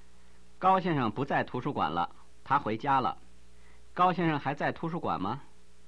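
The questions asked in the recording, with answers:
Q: 高先生还在图书馆吗?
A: 不在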